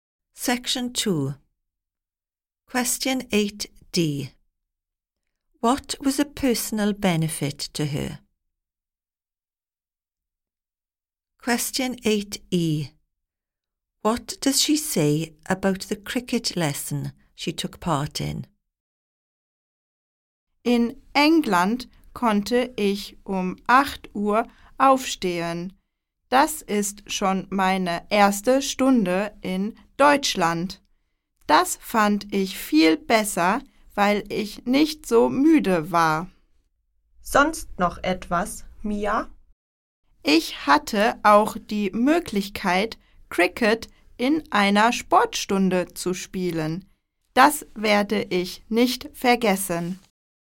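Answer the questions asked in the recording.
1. She could get up at 8 o'clock so she was not so tired
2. She will never forget it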